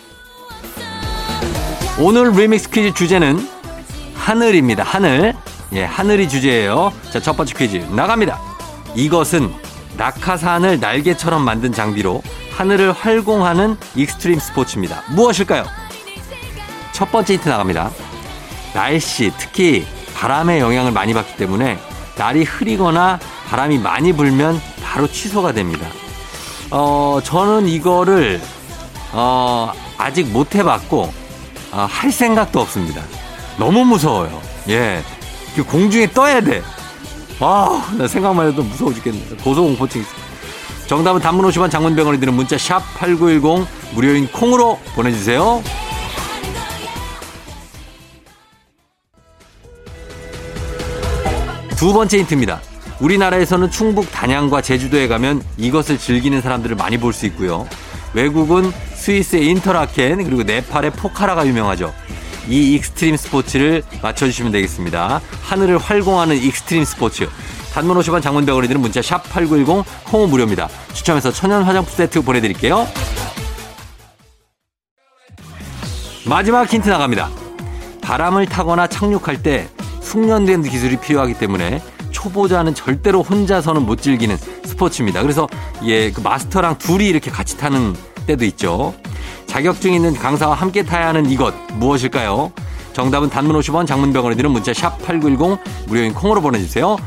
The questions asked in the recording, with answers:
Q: 이것은 낙하산을 날개처럼 만든 장비로 하늘을 활공하는 익스트림 스포츠입니다.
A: 정답은 바로 두구두구두구두구두구두구두구두구 패러글라이딩입니다.